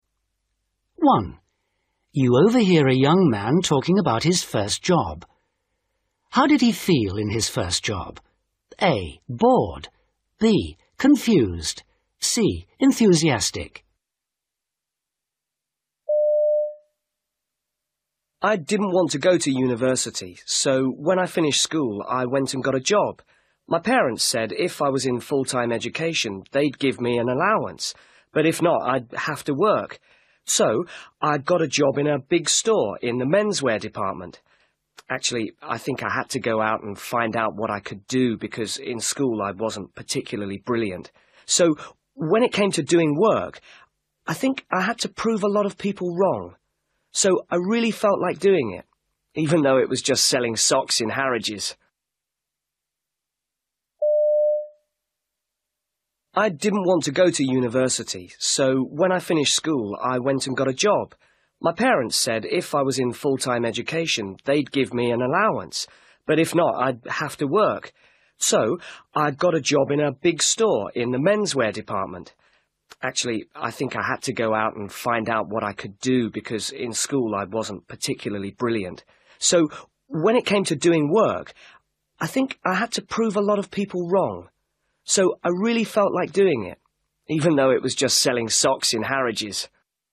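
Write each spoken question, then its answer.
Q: How did he feel in his first job?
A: C: Enthusiastic.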